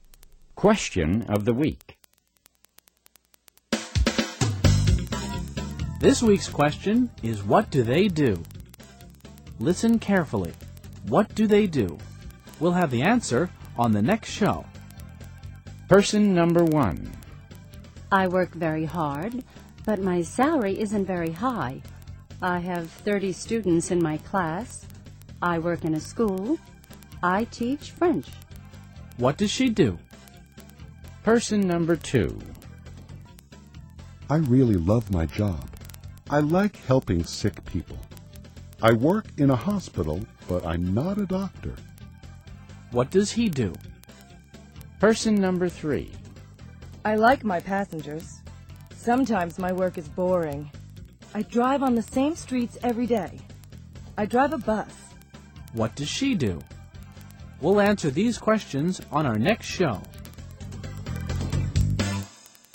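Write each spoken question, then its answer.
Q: What does she do?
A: She is a French teacher.

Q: What does she do?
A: She is a bus driver.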